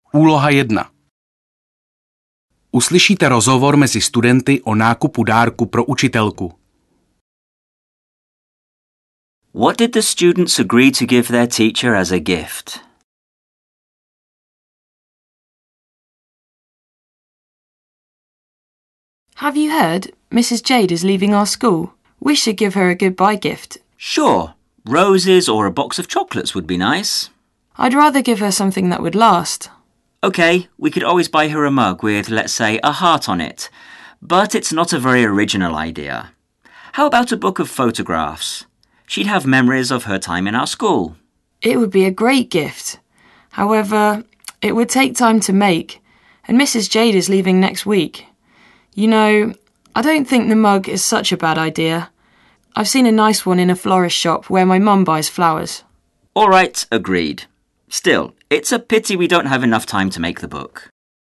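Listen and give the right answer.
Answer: A mug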